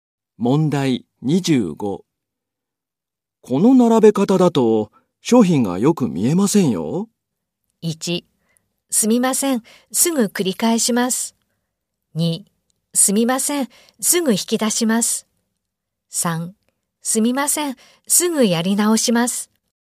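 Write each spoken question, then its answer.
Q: この並べ方だと、商品がよく見えませんよ。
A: 1: すみません、すぐやり直します。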